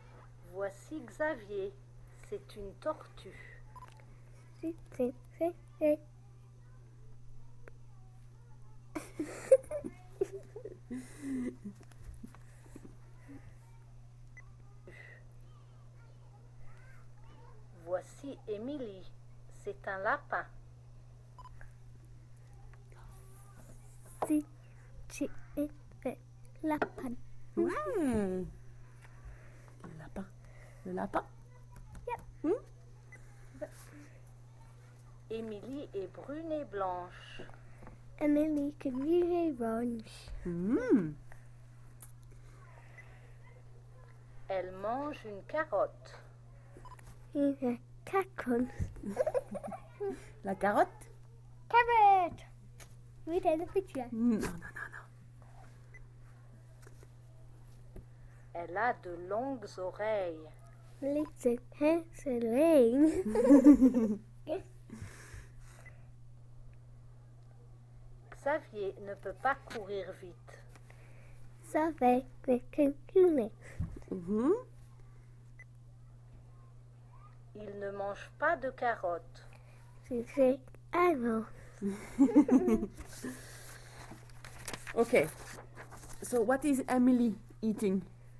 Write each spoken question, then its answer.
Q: So what is Emily eating?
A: Carrot.